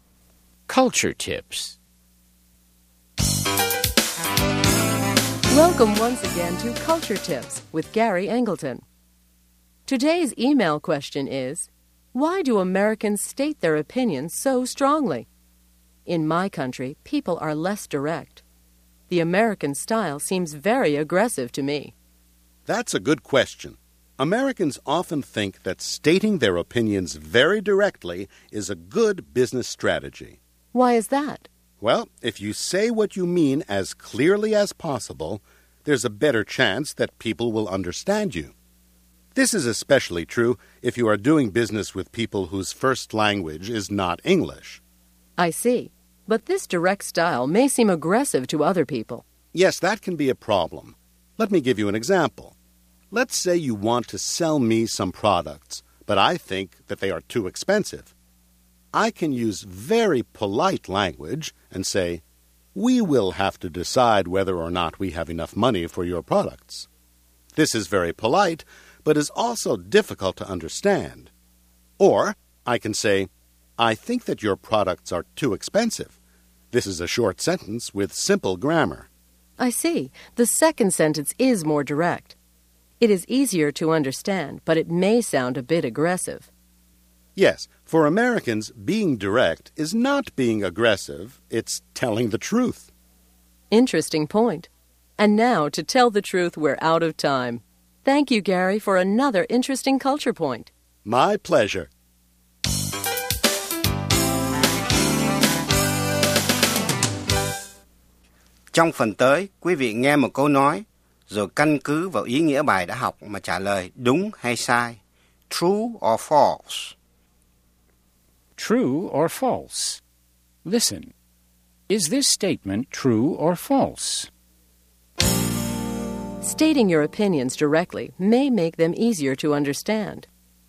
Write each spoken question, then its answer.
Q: Stating your opinions directly may make them easier to understand.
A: True, especially when the sentences are short and the grammar is simple.